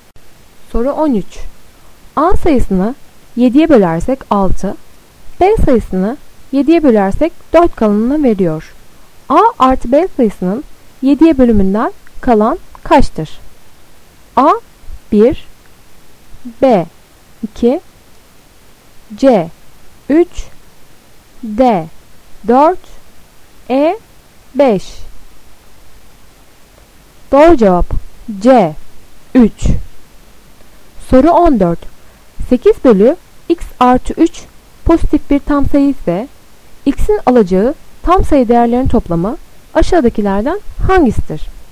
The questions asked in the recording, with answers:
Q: A artı B sayısının 7'ye bölümünden kalan kaçtır?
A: Doğru cevap C 3